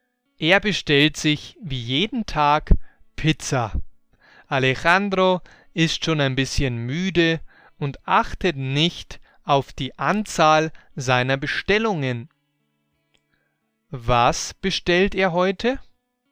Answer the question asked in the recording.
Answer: Pizza wie jeden Tag.